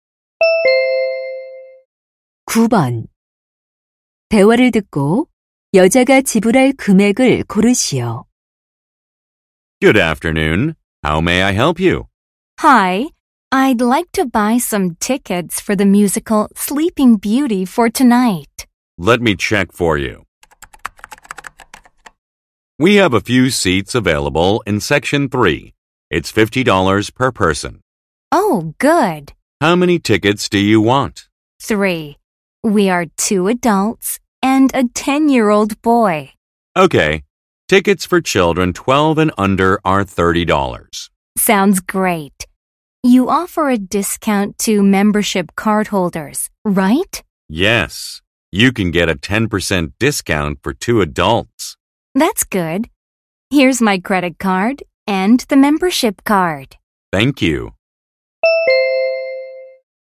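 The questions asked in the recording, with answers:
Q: 대화를 듣고 여자가 지불할 금액을 고르시오.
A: 120달러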